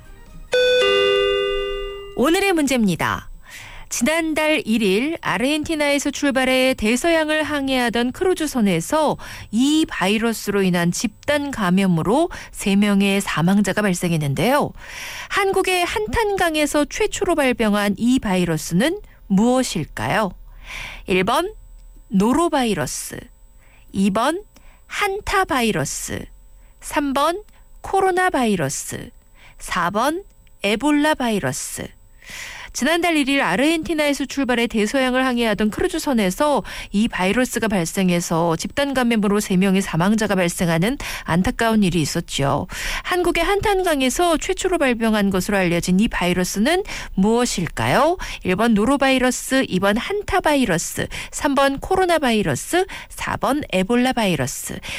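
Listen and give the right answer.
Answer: 2번: 한타바이러스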